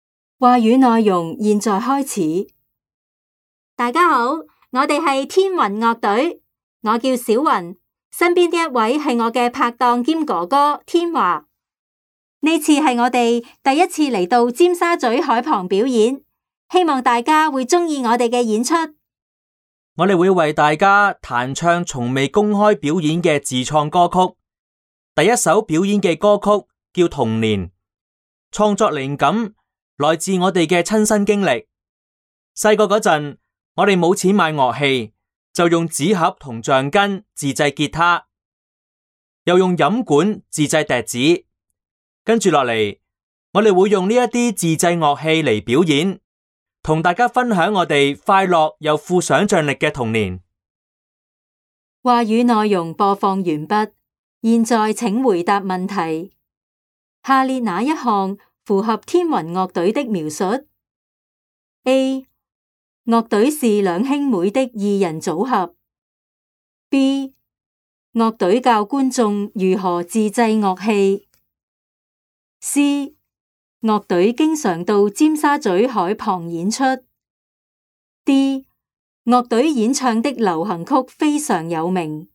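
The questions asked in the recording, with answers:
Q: 下列哪一项符合天云乐队的描述 ?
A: A: 乐队是两兄妹的二人组合。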